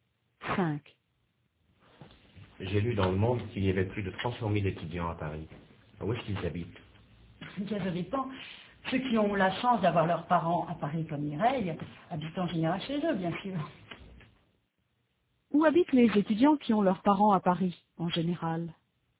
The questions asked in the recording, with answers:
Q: Où habitent les étudiants qui ont leurs parents à Paris, en général ?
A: Chez eux.